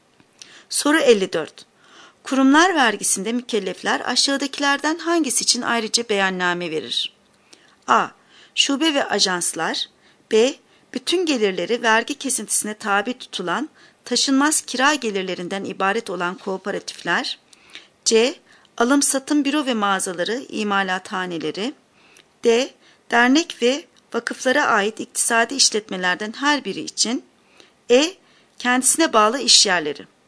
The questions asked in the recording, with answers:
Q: Kurumlar vergisinde mükellefler aşağıdakilerden hangisi için ayrıca beyanname verir?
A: Doğru cevap D. Dernek ve vakıflara ait iktisadi işletmelerden her biri için.